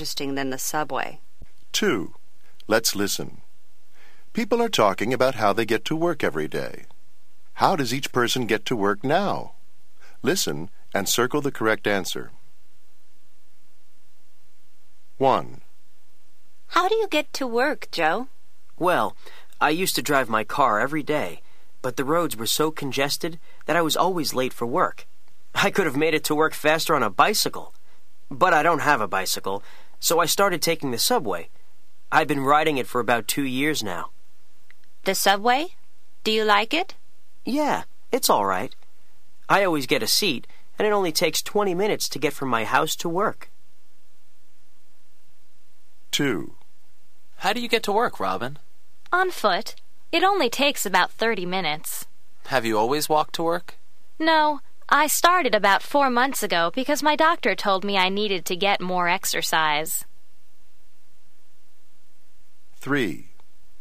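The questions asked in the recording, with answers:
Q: How does each person get to work now?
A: Joe takes the subway.

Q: How does each person get to work now?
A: Robin walks (on foot).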